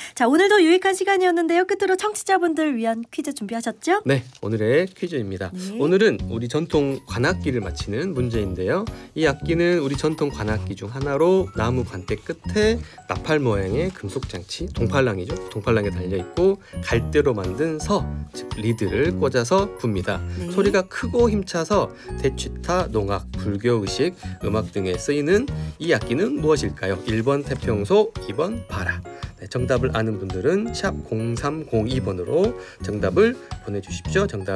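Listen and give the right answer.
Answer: 1: 태평소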